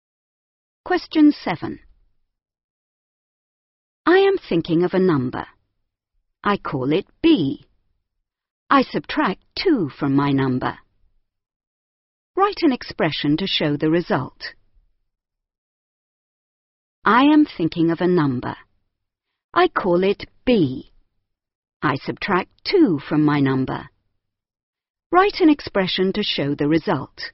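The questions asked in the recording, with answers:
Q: Write an expression to show the result.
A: B - 2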